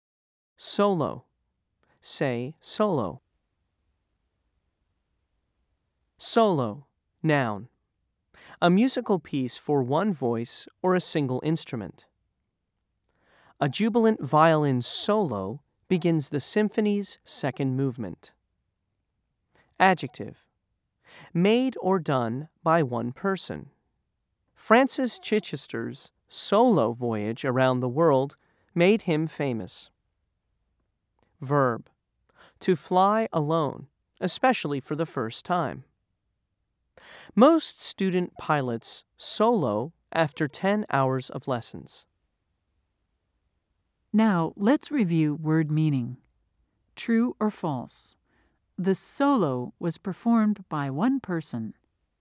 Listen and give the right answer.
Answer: If you said true, you are correct.